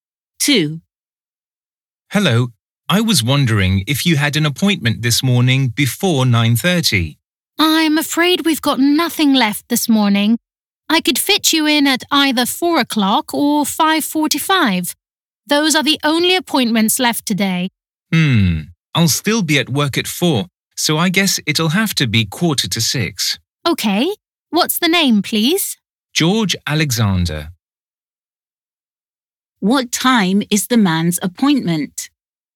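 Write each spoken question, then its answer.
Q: What time is the man's appointment?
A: 5:45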